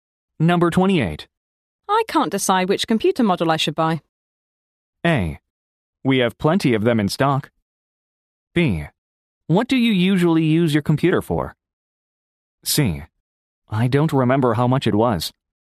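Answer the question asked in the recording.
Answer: B: What do you usually use your computer for?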